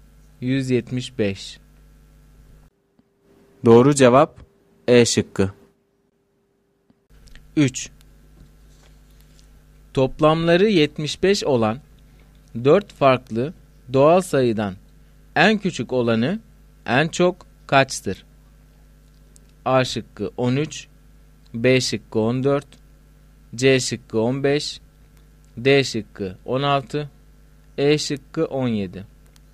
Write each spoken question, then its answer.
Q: Toplamları 75 olan 4 farklı doğal sayıdan en küçük olanı en çok kaçtır?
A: Doğru cevap E şıkkı.